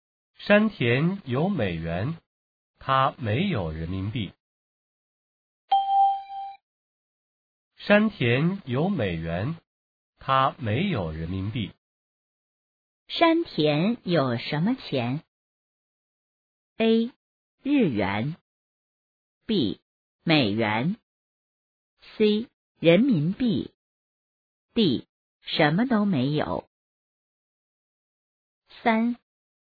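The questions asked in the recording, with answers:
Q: 山田有什么钱?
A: B: 美元。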